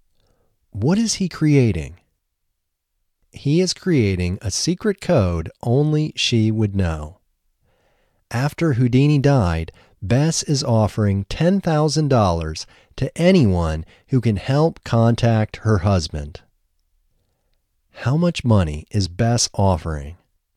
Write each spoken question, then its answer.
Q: How much money is Bess offering?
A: Bess is offering $10,000.